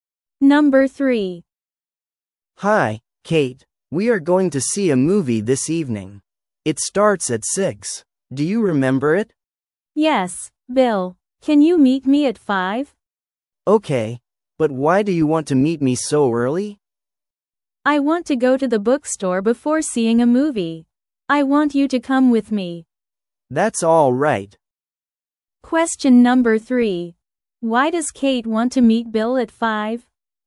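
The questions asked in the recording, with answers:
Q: Why does Kate want to meet Bill at 5?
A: Because she wants to go to the bookstore with him before the movie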